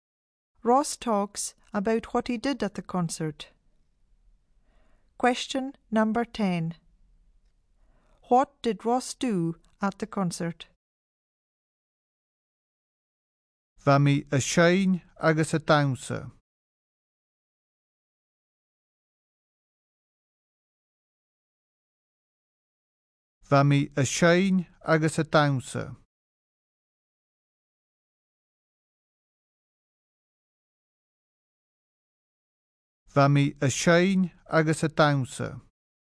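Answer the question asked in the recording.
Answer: He sang and danced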